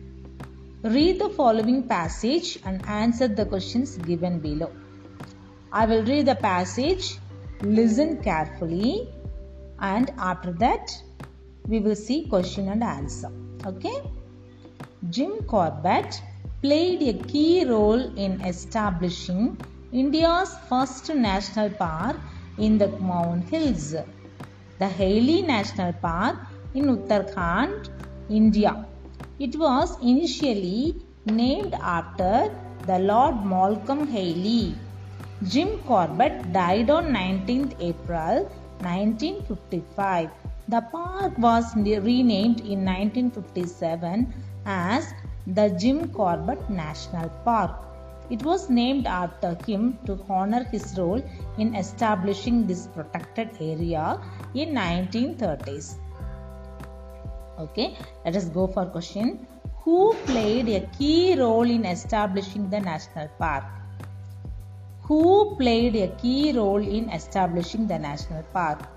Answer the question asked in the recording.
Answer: Jim Corbett.